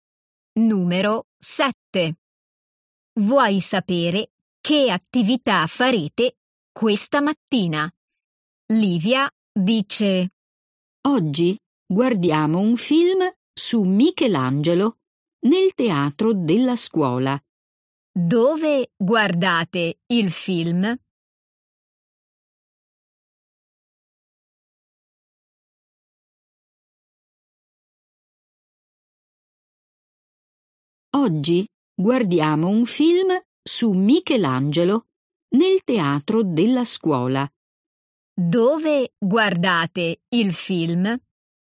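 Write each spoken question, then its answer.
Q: Dove guardate il film?»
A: Nel teatro della scuola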